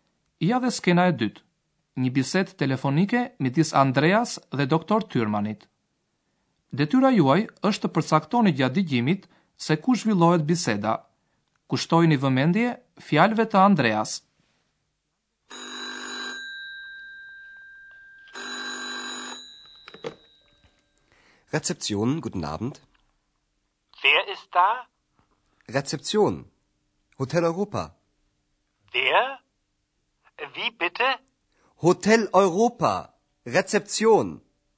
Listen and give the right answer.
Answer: Telefonin në sportelin e hotelit në gjermanisht Rezeption e merr Andrea.